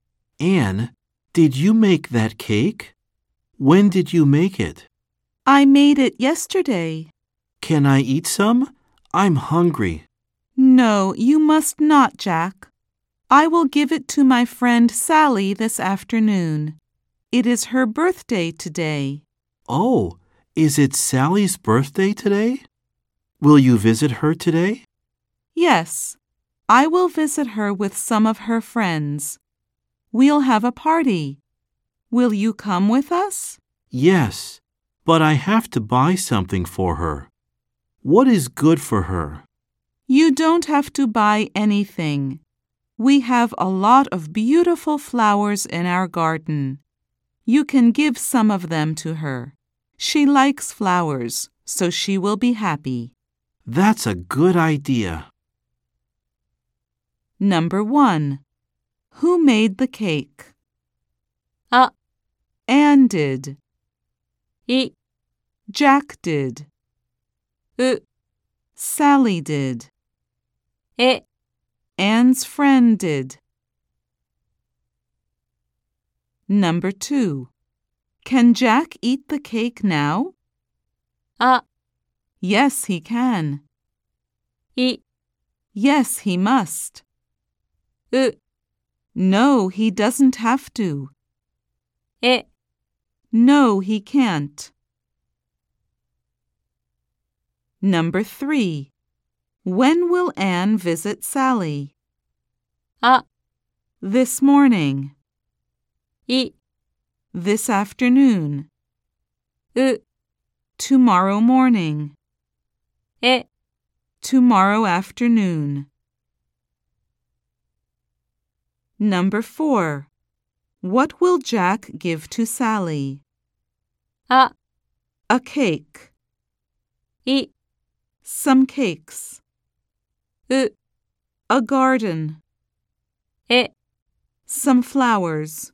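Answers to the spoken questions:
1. A: Anne did.
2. E: No, he can't.
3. I: This afternoon.
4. E: Some flowers.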